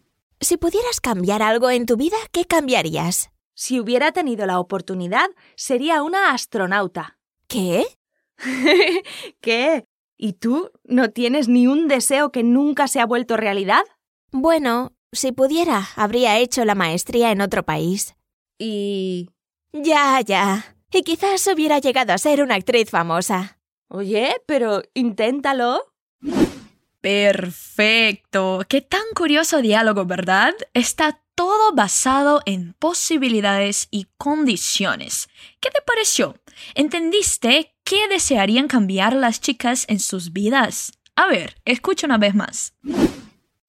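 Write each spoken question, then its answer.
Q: ¿Entendiste qué desearían cambiar las chicas en sus vidas?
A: Una habría querido ser astronauta; la otra habría hecho la maestría en otro país y quizás habría llegado a ser una actriz famosa.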